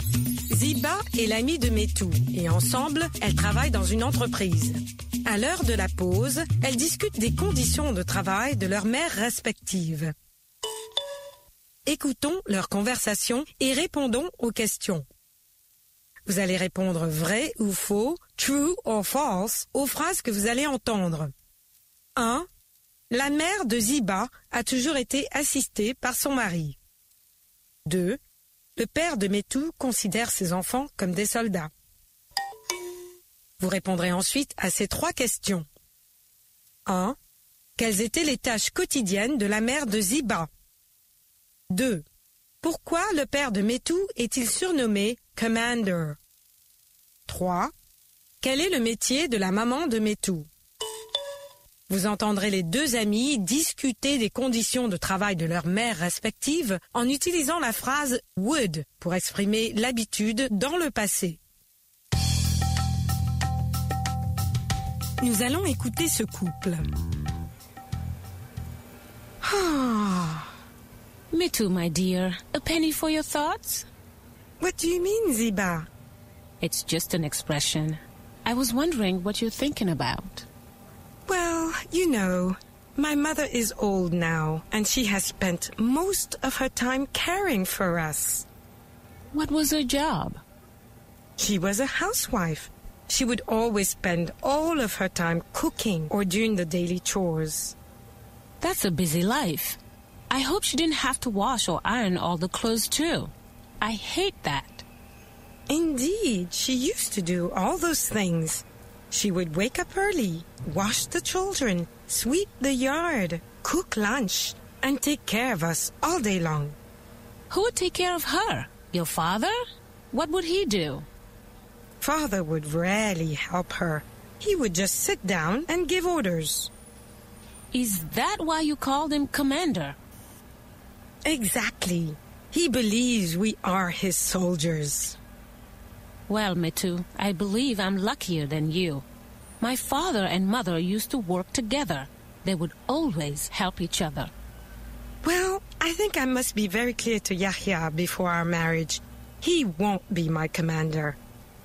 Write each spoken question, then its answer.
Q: La mère de Ziba a toujours été assistée par son mari.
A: L'énoncé 1 est vrai.

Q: Pourquoi le père de Métou est-il surnommé « Commander »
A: Parce qu'il ne faisait que donner des ordres.

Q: Quel est le métier de la maman de Métou?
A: Elle est femme au foyer.